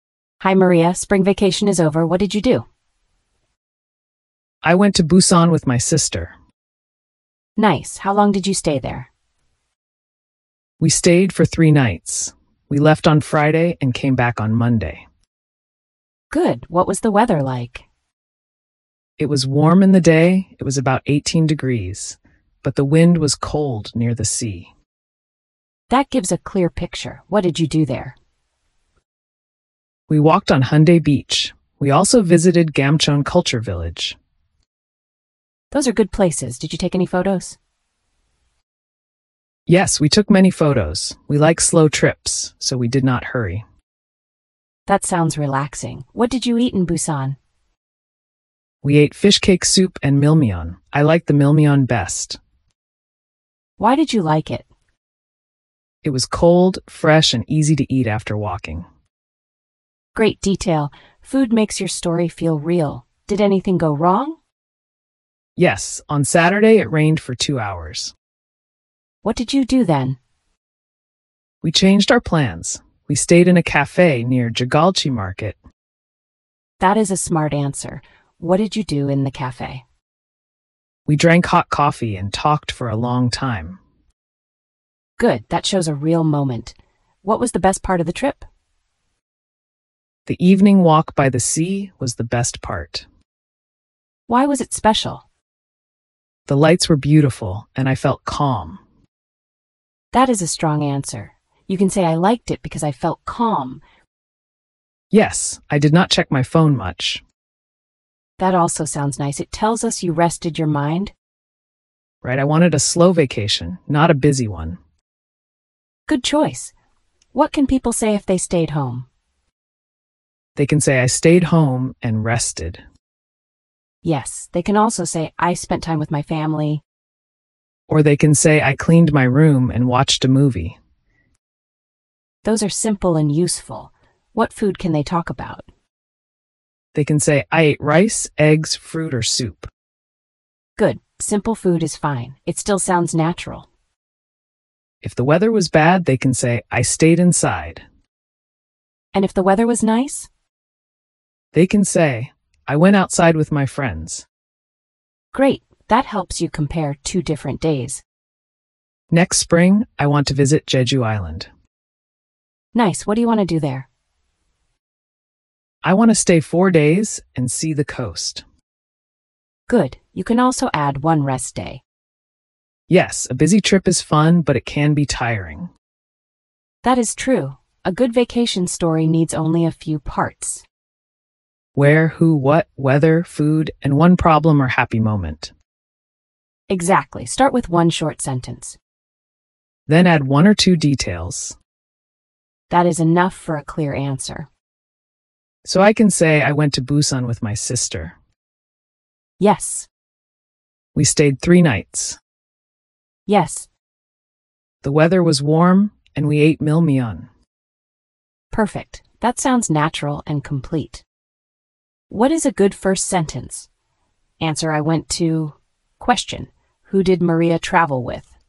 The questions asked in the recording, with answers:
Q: who did Maria travel with?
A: She traveled with her sister.